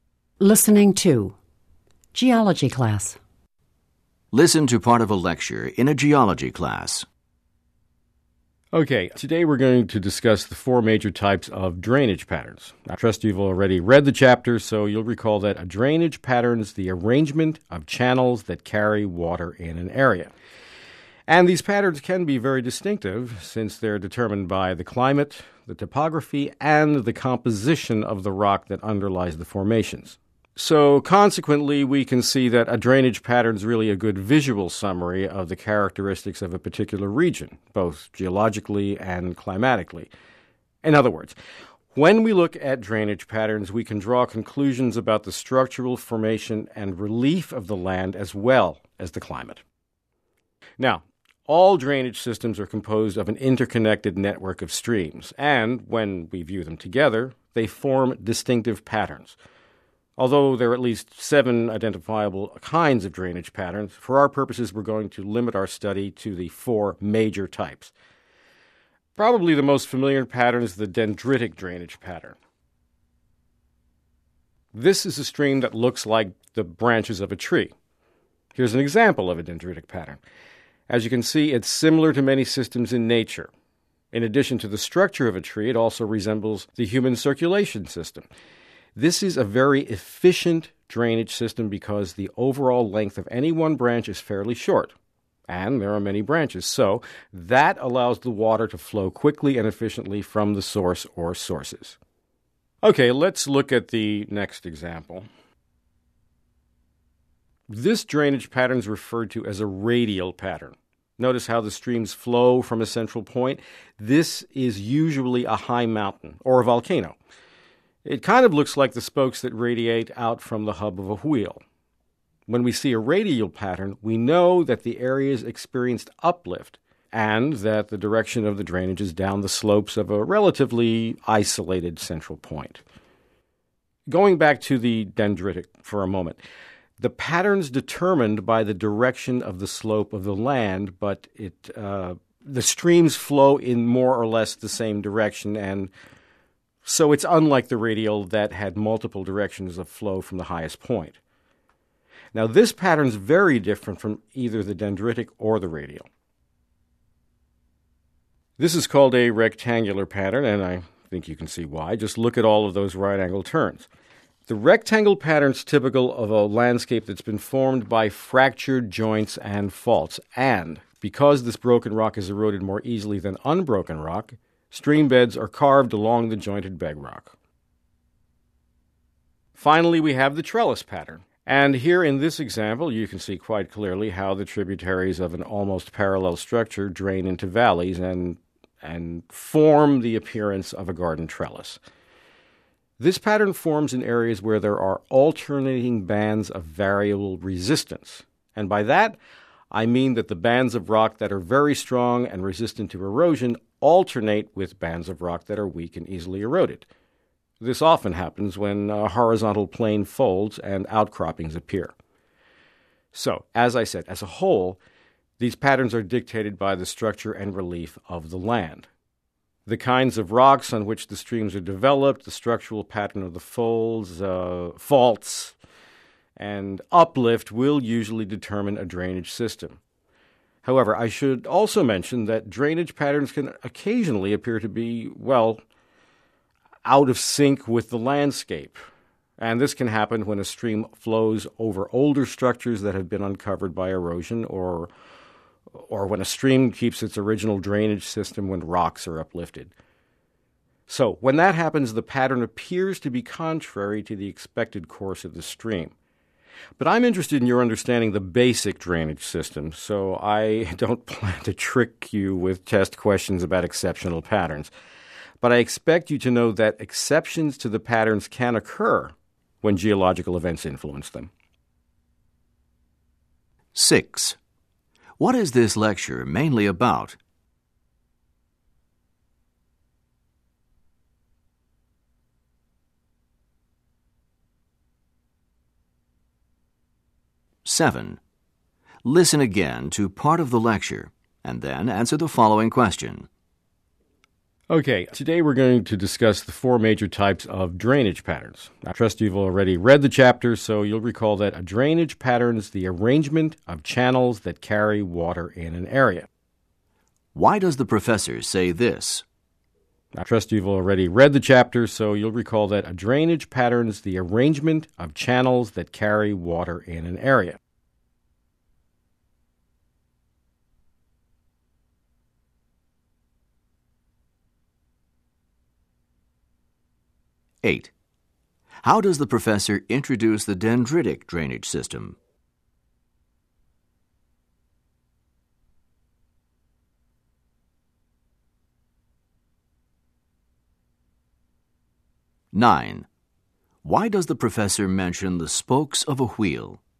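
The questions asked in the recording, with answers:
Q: What is this lecture mainly about?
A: The four major types of drainage patterns

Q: How does the professor introduce the dendritic drainage system?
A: By comparing it to the branches of a tree

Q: Why does the professor mention the spokes of a wheel?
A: To describe the radial pattern, with streams flowing out from a central point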